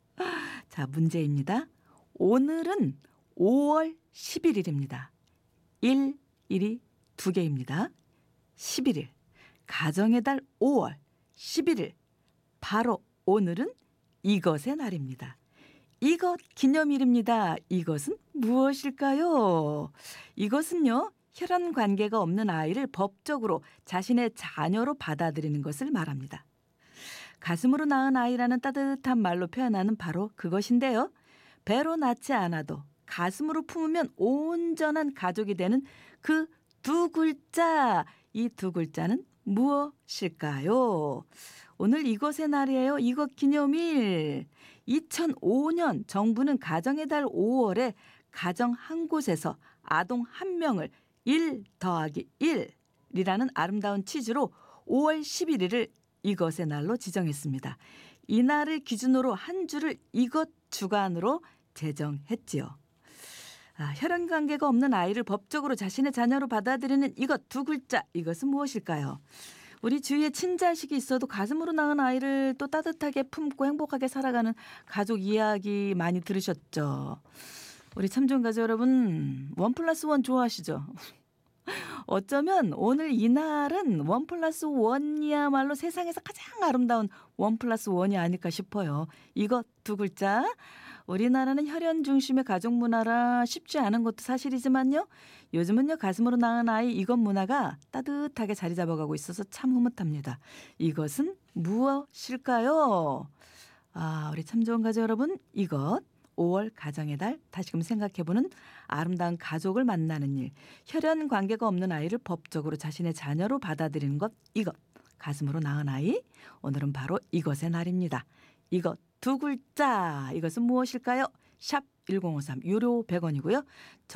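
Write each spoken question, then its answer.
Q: 이것 두 글자, 이것은 무엇일까요?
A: 입양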